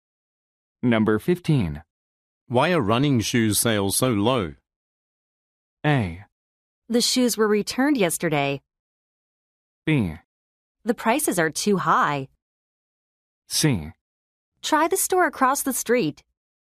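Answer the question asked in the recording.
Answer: B: The prices are too high.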